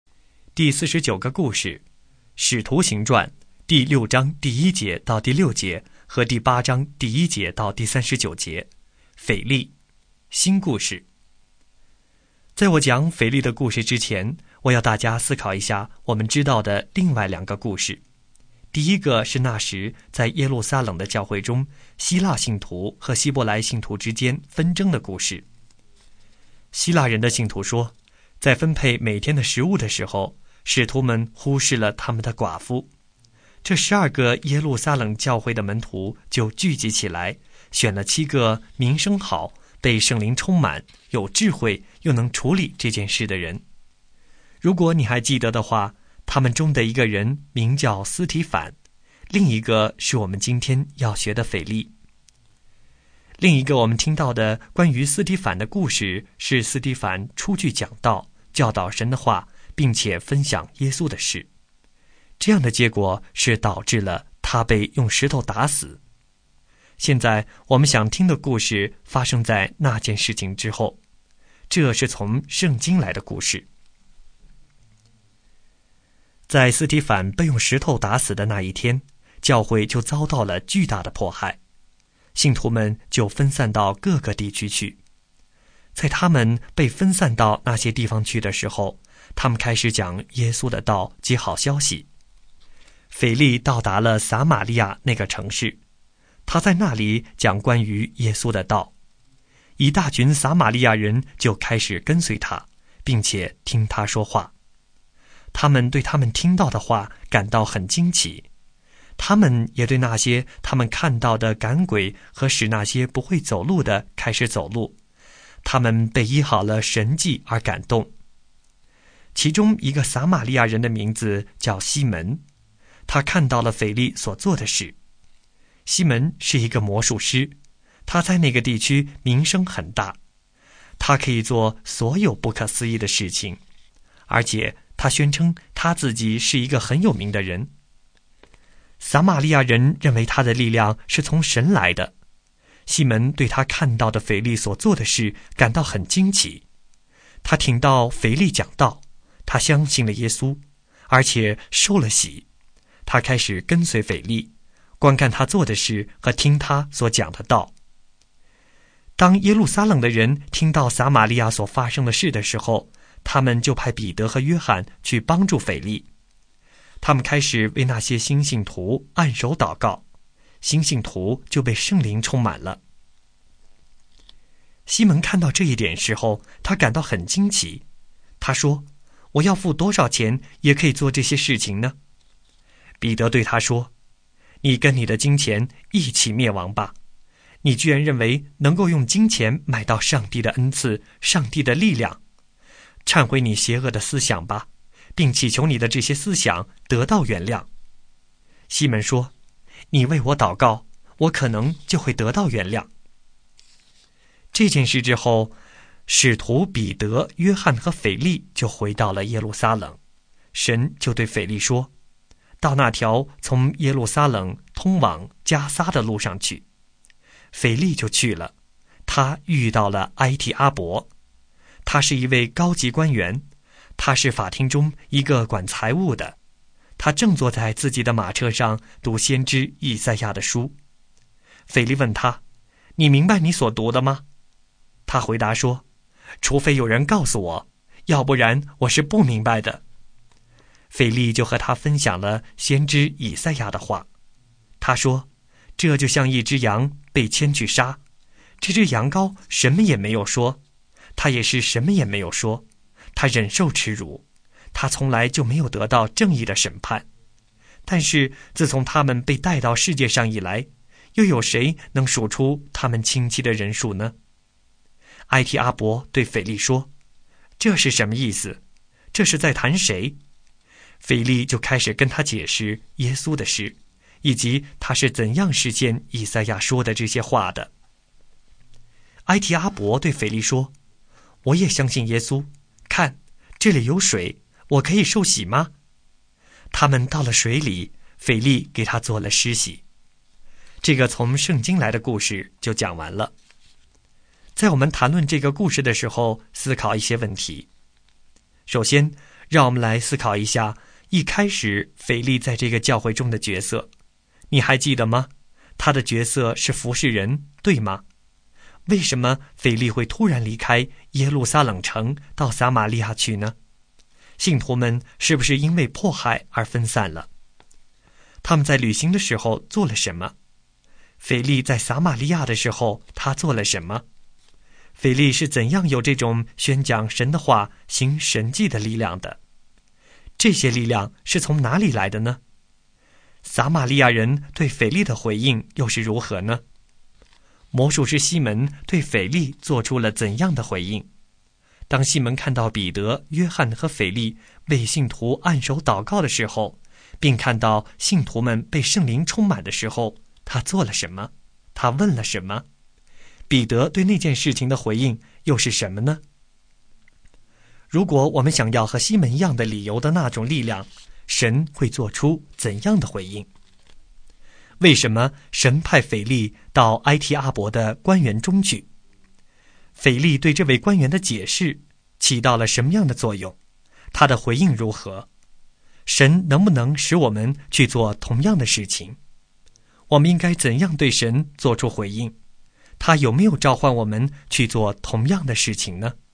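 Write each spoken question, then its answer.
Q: 腓力在撒玛利亚的时候他做了什么?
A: 讲关于耶稣的道,赶鬼、医治病人

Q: 撒玛利亚人对腓力的回应又是如何呢?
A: 一大群人跟随他、听他讲道,并感到惊奇

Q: 魔术师西门对腓力做出了怎样的回应?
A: 相信了耶稣,受了洗,并跟随腓力

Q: 他问了什么?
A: 要付多少钱才能做这些事

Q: 彼得对那件事情的回应又是什么呢?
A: 斥责他想用钱买神的恩赐,叫他忏悔,祈求原谅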